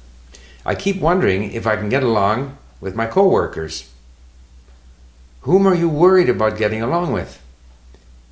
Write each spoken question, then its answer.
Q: Whom are you worried about getting along with?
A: I'm wondering if I can get along with my co-workers.